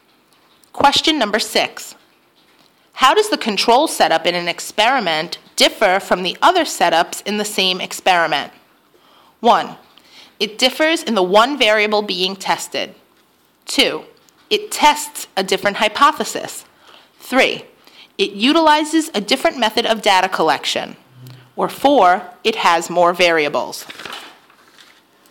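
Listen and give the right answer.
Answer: 1: It differs in the one variable being tested.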